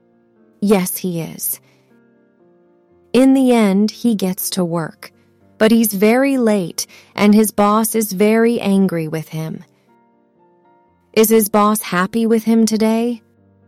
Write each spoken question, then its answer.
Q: Is his boss happy with him today?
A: No, he's not.